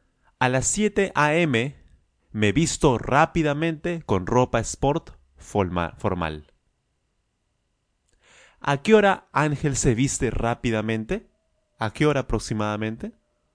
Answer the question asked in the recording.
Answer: A las 7 a.m. A las 7 a.m., a las 7 de la mañana.